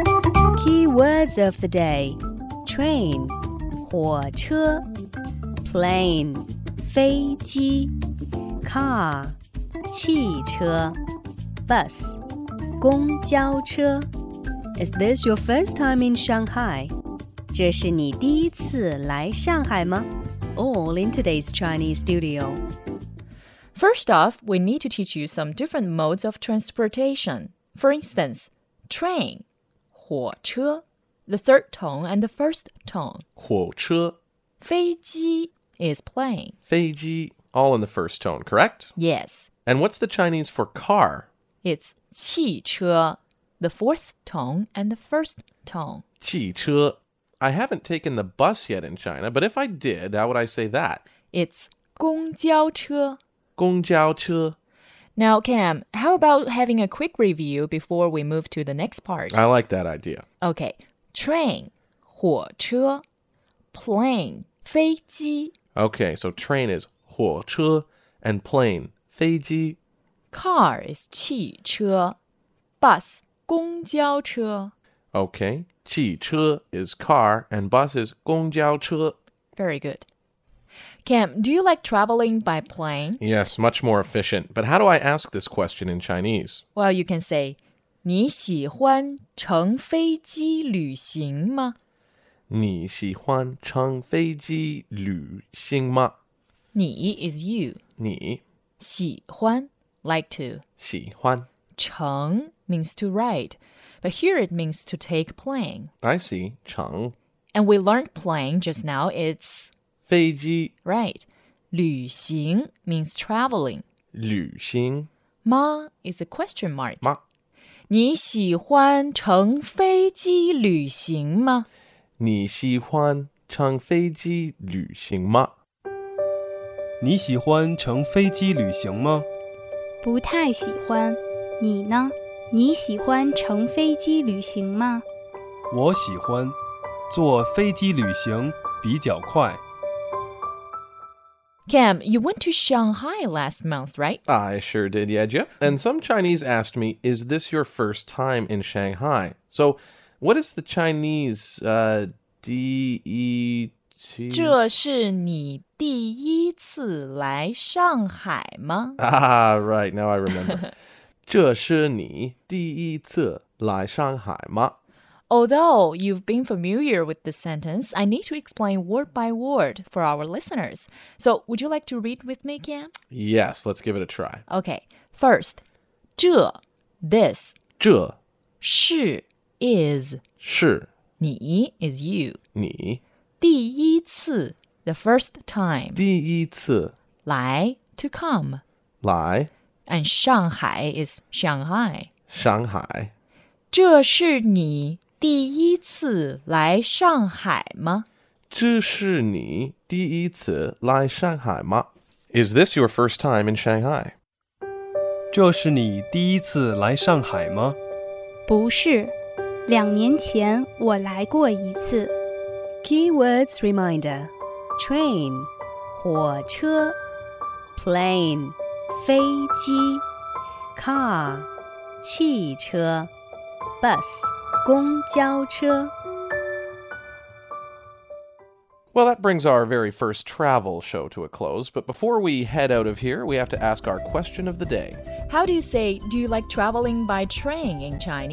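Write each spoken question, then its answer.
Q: How do you say, do you like traveling by train in Chinese?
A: 你喜欢乘火车旅行吗?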